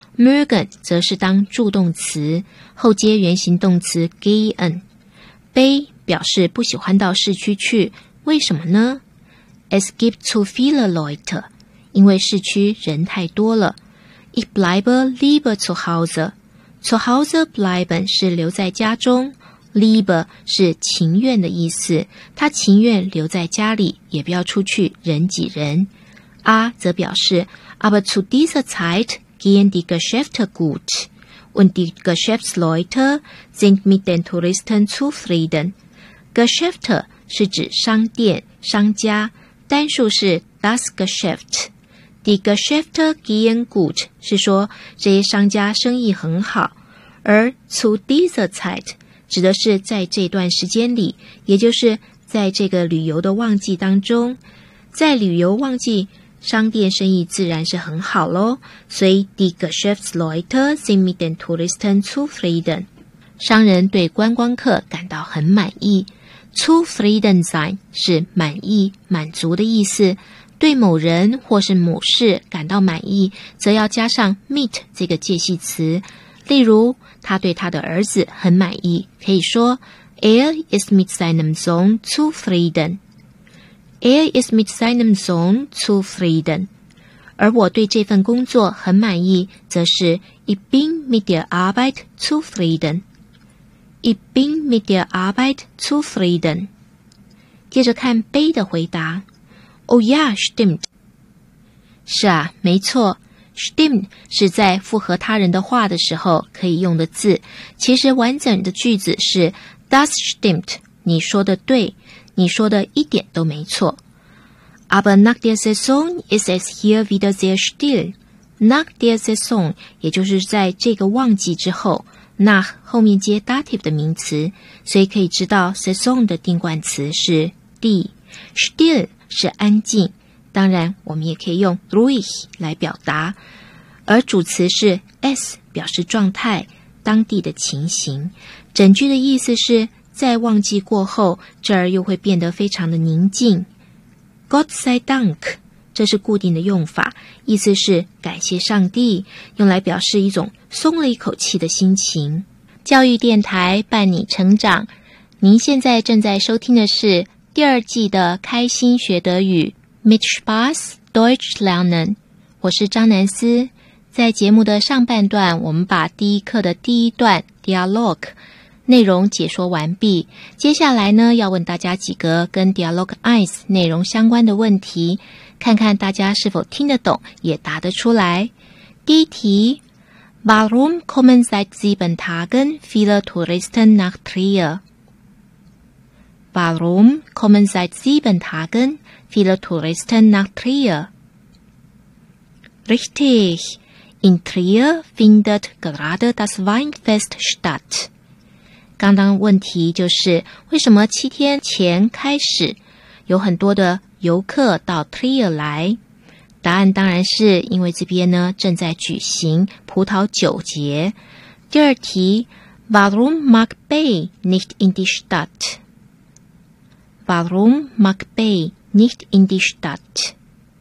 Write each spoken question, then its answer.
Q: Warum mag Bay nicht in die Stadt?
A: Bay geht nicht gern in die Stadt, denn es gibt dort zu viele Leute.